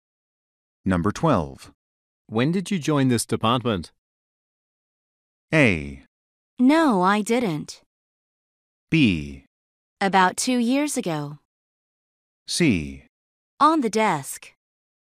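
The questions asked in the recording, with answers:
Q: When did you join this department?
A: B: About 2 years ago.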